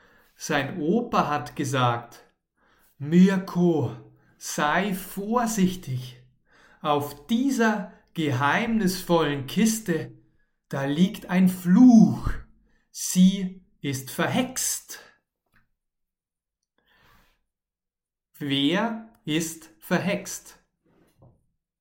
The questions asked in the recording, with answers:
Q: Wer ist verhext?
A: Die Kiste. Die Kiste ist verhext.